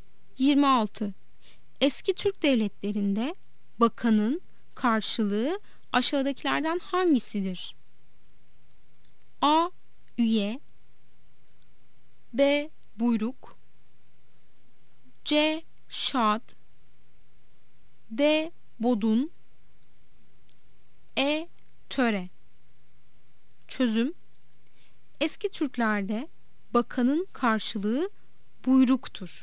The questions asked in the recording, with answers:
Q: Eski Türk devletlerinde bakanın karşılığı aşağıdakilerden hangisidir?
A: Yanıt: B'dir. Buyruk.